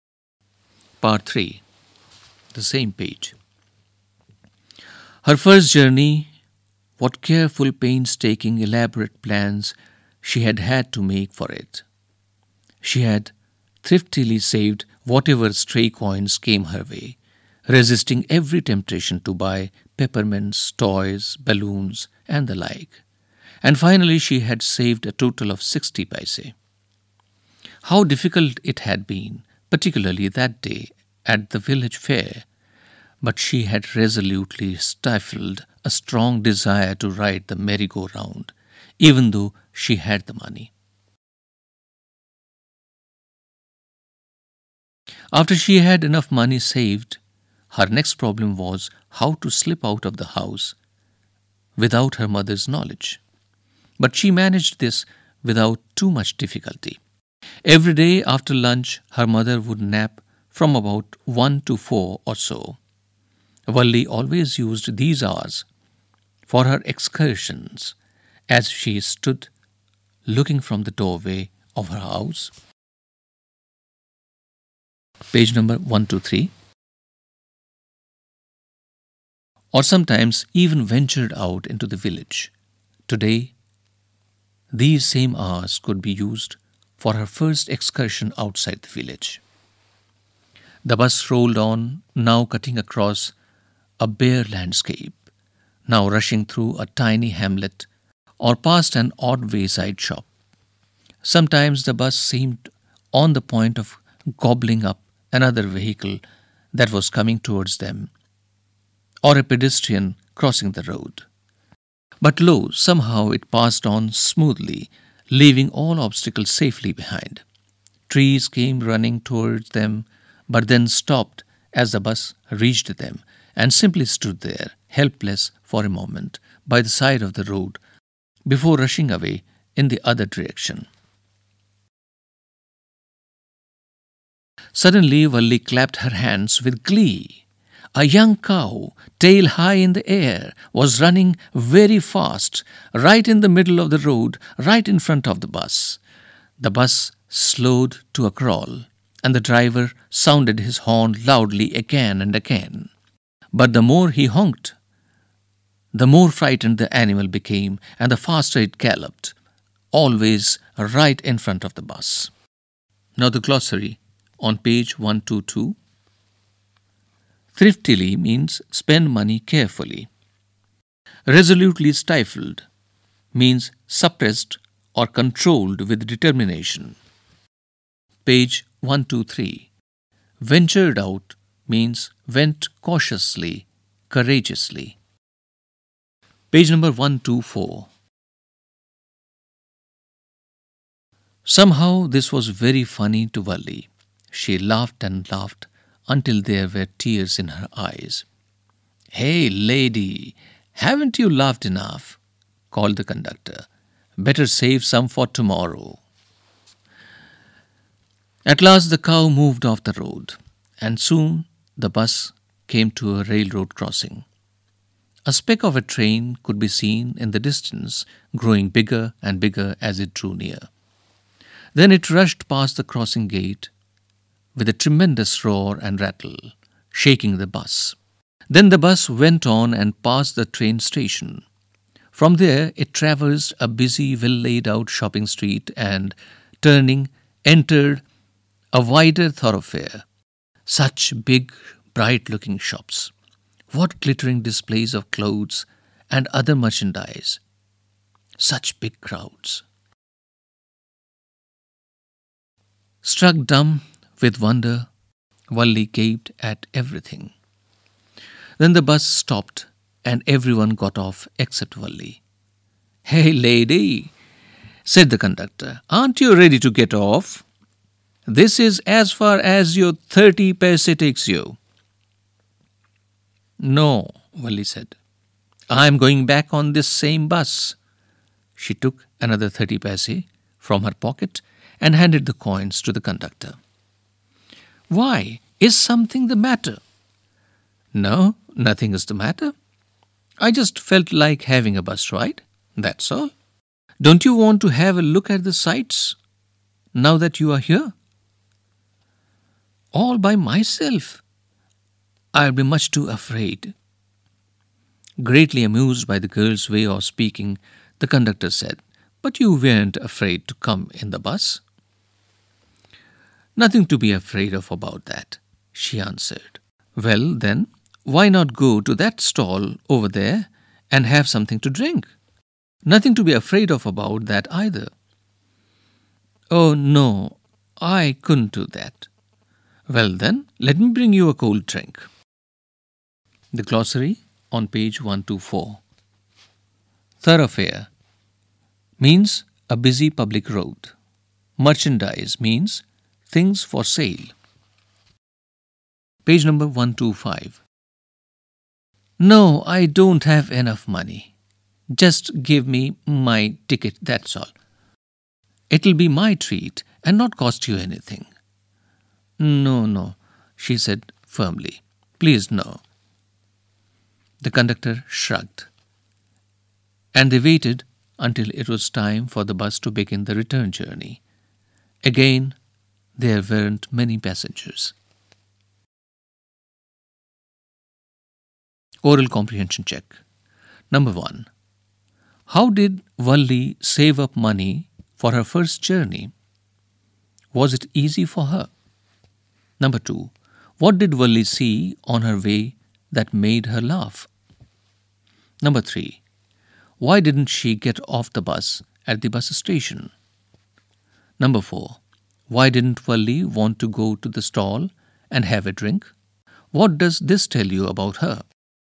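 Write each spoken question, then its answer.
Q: How did Valli save up money for her first journey?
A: She saved every stray coin and did not buy peppermints, toys, balloons or rides

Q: Was it easy for her?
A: No, it was difficult, especially at the village fair

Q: What did Valli see on her way that made her laugh?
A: A young cow running fast in the middle of the road in front of the bus

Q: Why didn't she get off the bus at the bus station?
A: She only wanted a bus ride and planned to go back on the same bus; she was too afraid to see the sights alone

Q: Why didn't Valli want to go to the stall and have a drink?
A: She didn't have enough money, and she refused to let the conductor pay for her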